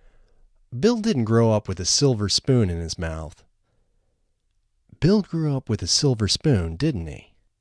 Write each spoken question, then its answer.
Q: Bill grew up with a silver spoon, didn't he?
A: No, Bill didn't grow up with a silver spoon.